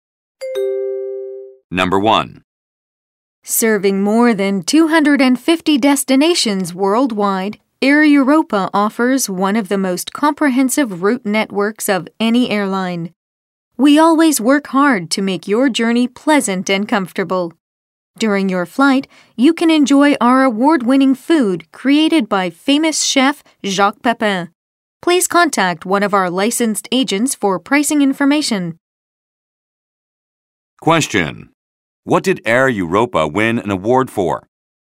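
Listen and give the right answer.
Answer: Its food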